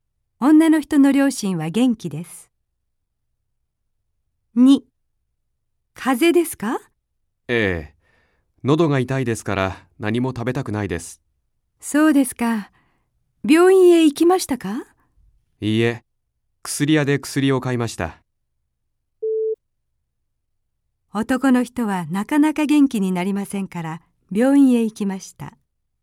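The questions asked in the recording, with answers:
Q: 男の人はなかなか元気になりませんから、病院へ行きました。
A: ×(病院へ行かず、薬屋で薬を買った)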